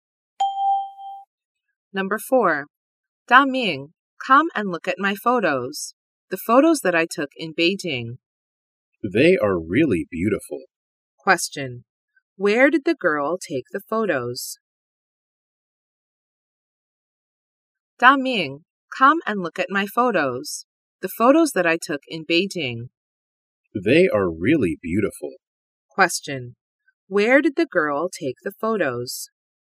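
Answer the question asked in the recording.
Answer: In Beijing.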